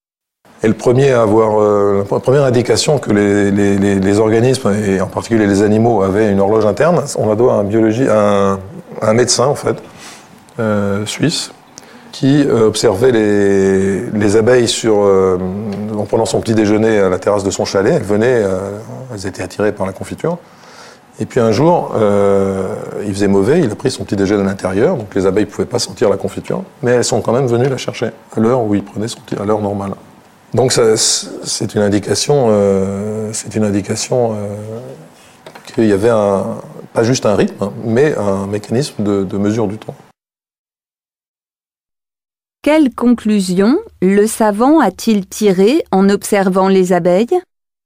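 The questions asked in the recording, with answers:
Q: Quelle conclusion le savant a-t-il tirée en observant les abeilles ?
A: Les abeilles ont une horloge interne, un mécanisme de mesure du temps.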